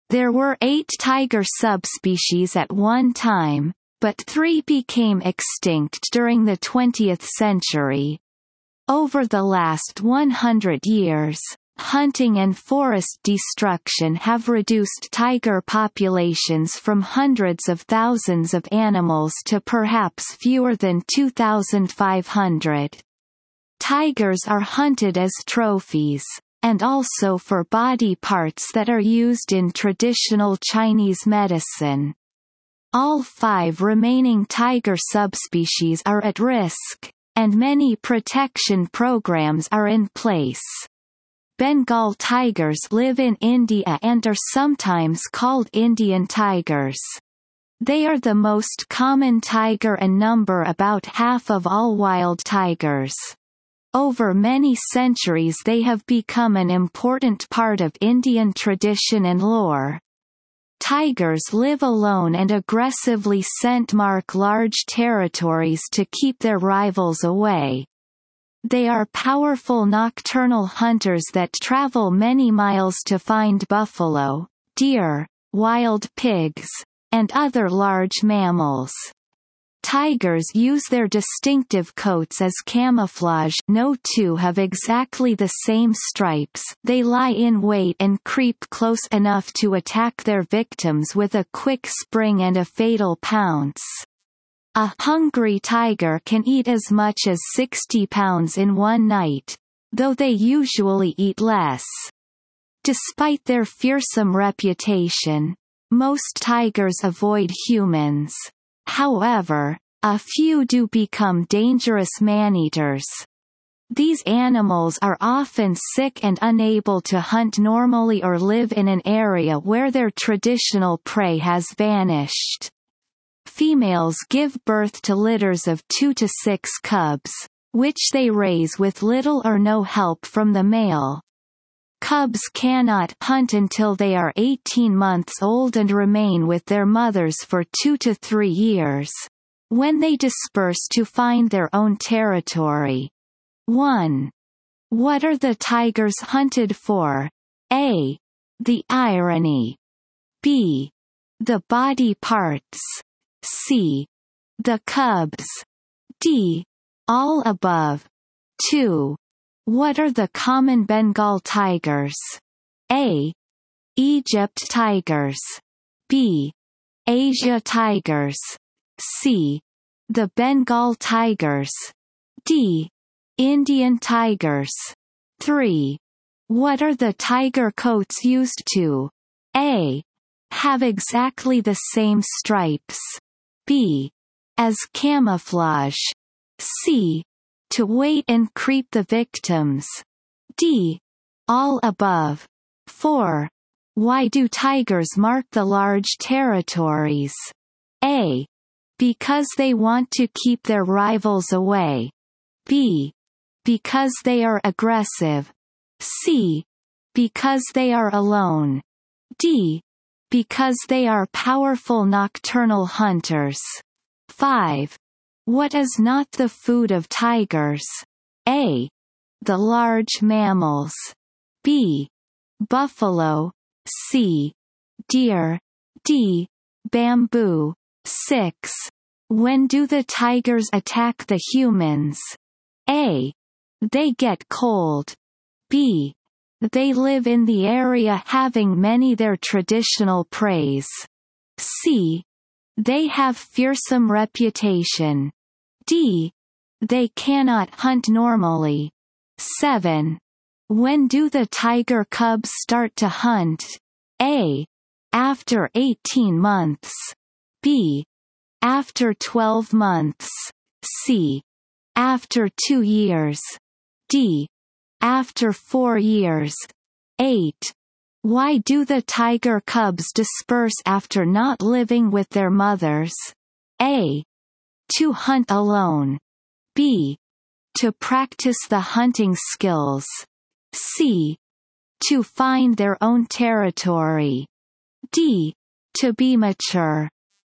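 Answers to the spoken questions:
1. B: The body parts.
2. D: Indian tigers.
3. B: As camouflage.
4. A: Because they want to keep their rivals away.
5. D: Bamboo.
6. D: They cannot hunt normally.
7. A: After 18 months.
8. C: To find their own territory.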